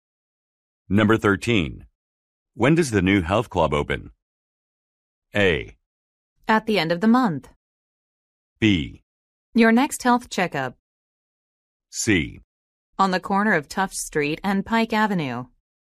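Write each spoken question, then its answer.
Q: When does the new health club open?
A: A: At the end of the month.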